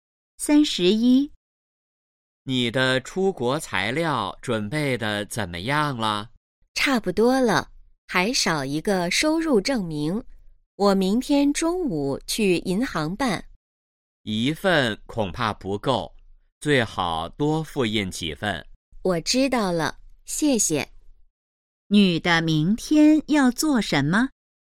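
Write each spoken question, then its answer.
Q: 女的明天要做什么?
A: 去银行办收入证明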